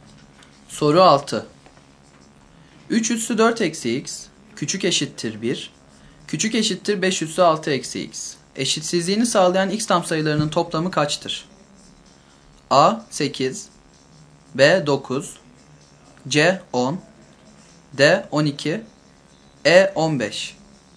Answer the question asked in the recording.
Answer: Doğru yanıt E şıkkı.